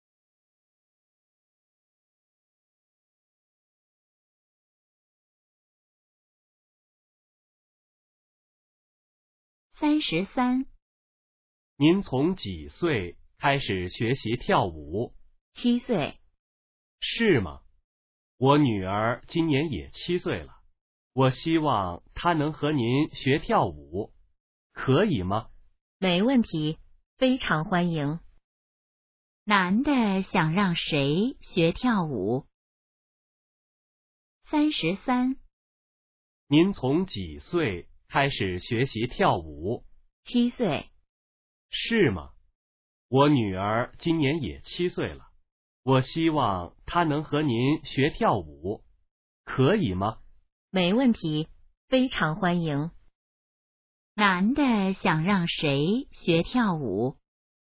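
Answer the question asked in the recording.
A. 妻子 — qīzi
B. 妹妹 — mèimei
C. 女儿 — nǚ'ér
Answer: C. 女儿 — nǚ'ér

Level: HSK2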